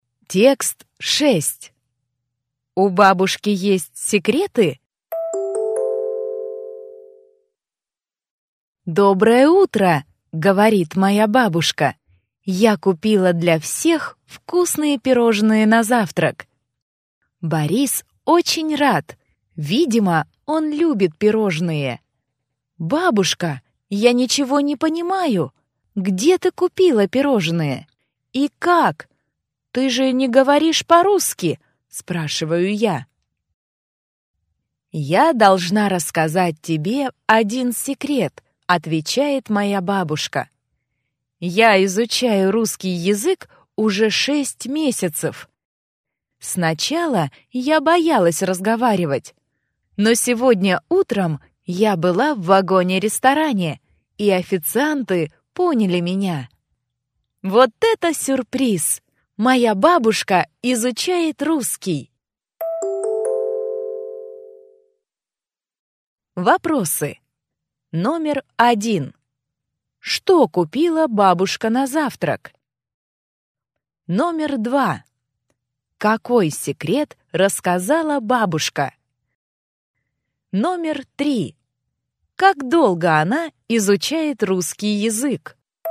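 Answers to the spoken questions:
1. Вкусные пирожные
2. Она изучает русский язык
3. 6 месяцев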